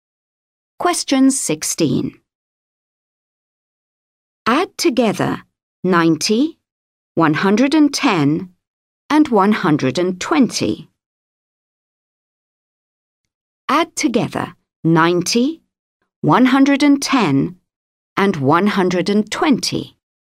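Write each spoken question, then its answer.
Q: Add together 90, 110, and 120.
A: 320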